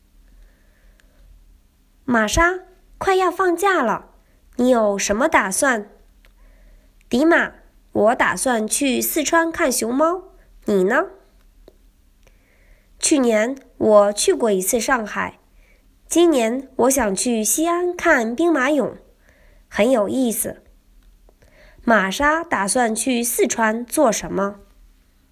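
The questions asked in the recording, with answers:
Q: 玛莎打算去四川做什么?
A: 看熊猫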